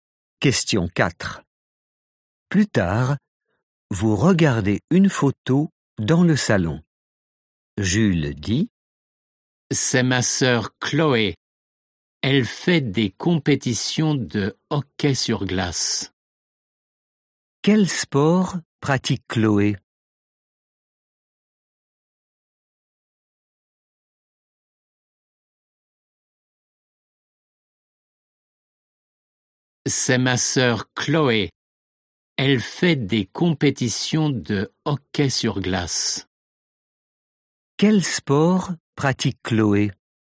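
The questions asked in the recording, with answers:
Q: Quel sport pratique Chloé?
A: le hockey sur glace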